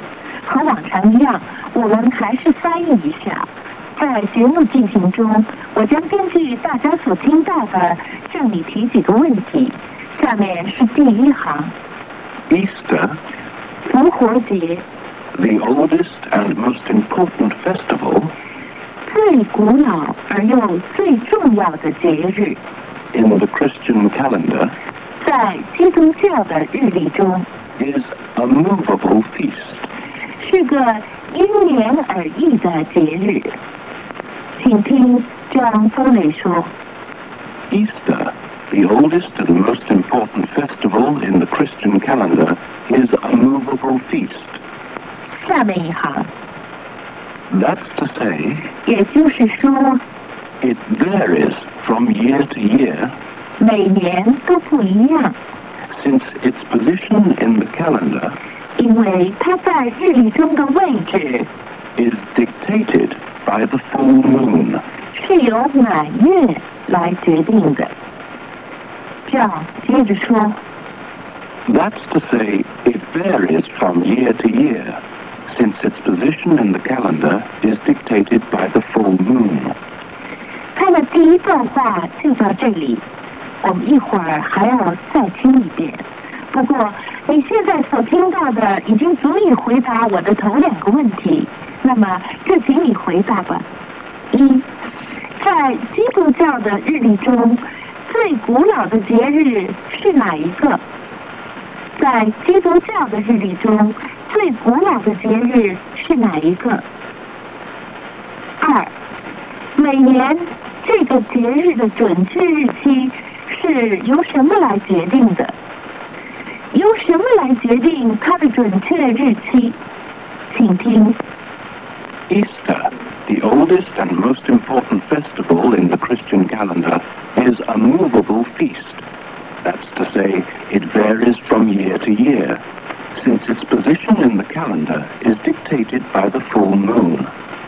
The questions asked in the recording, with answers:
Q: 在基督教的日历中最古老的节日是哪一个?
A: Easter,

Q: 每年这个节日的准确日期是由什么来决定的?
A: The full moon,